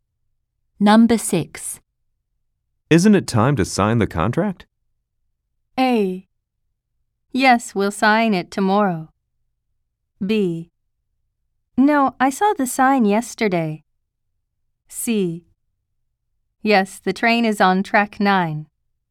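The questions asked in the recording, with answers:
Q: Isn't it time to sign the contract?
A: A: Yes, we'll sign it tomorrow.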